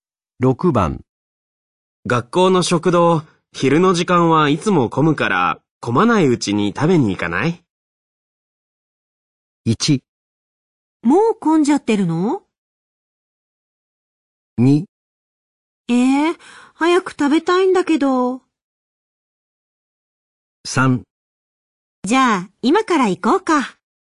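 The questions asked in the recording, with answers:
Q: 学校の食堂、昼の時間はいつも混むから、混まないうちに食べに行かない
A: 3: じゃあ、今から行こうか。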